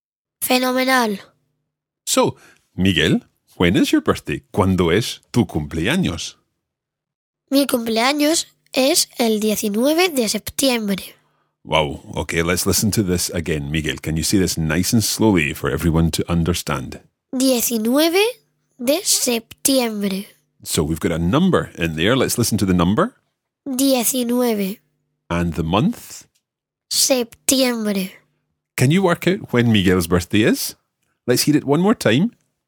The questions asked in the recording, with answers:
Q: Can you work out when Miguel's birthday is?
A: So Miguel's birthday is the 19th of September.